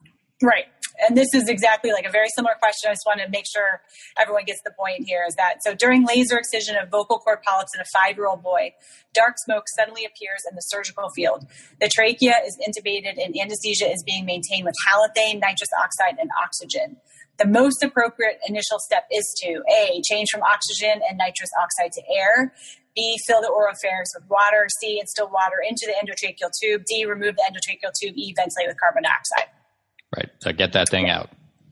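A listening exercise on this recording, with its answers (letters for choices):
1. During laser excision, dark smoke suddenly appears in surgical field. Trachea intubated, anesthesia maintained w/ halothane, nitrous, oxygen. Most appropriate initial step?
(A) Change gas to air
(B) Fill oropharynx w/ water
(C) Water into ETT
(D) Remove ETT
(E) Ventilate w/ CO2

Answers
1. D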